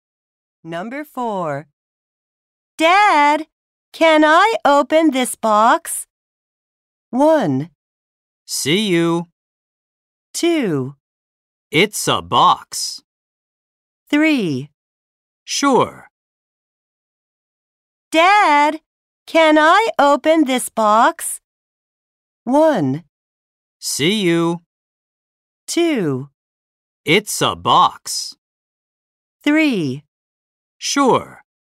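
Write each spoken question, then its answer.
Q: Dad, can I open this box?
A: 3: Sure.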